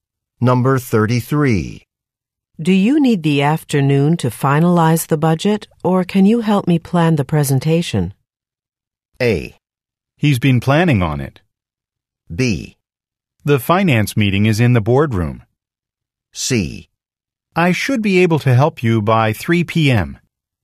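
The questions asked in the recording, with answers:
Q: Do you need the afternoon to finalize the budget, or can you help me plan the presentation?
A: C: I should be able to help you by 3 p.m.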